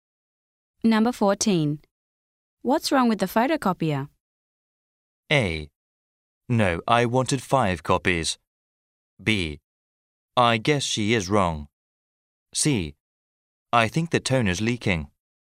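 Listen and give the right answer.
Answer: C: I think the tone is leaking.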